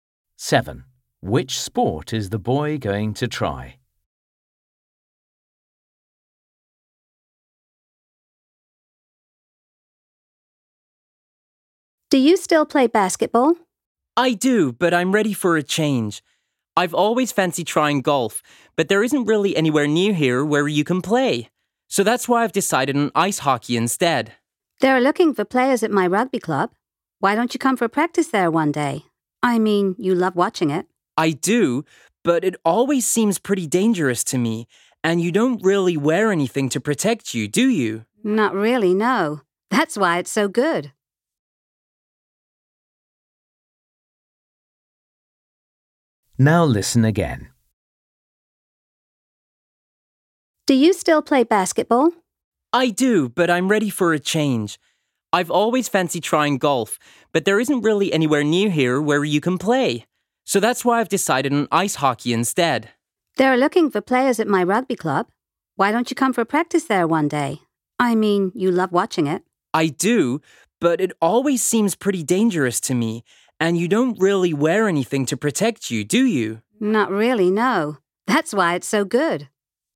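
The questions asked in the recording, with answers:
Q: Which sport is the boy going to try?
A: ice hockey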